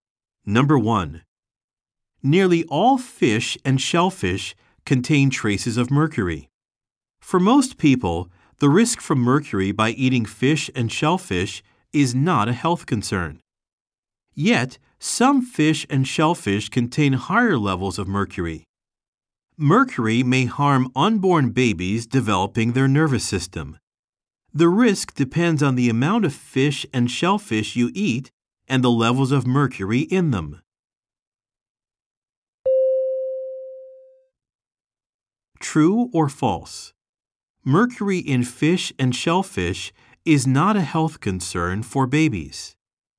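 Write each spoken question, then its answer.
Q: True or false? Mercury in fish and shellfish is not a health concern for babies.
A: False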